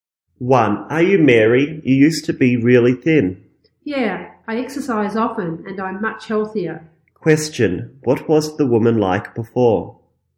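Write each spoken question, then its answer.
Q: What was the woman like before?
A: She was really thin.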